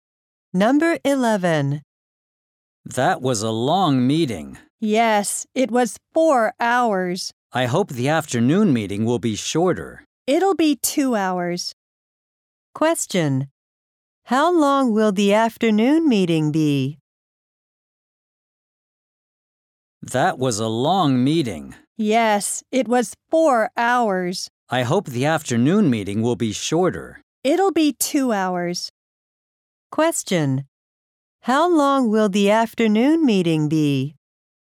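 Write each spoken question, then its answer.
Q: How long will the afternoon meeting be?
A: 2 hours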